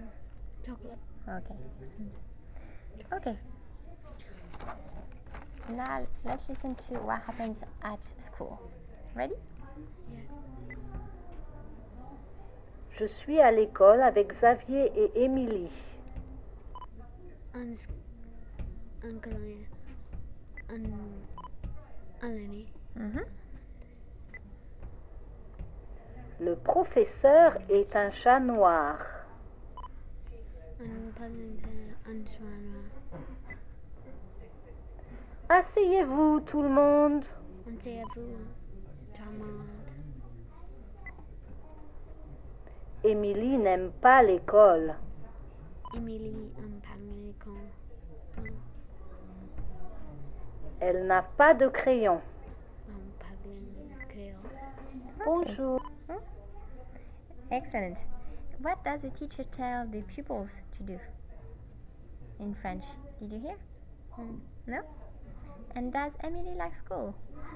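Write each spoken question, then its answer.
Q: What does the teacher tell the pupils to do in French?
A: Asseyez-vous (sit down)

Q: And does Emily like school?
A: No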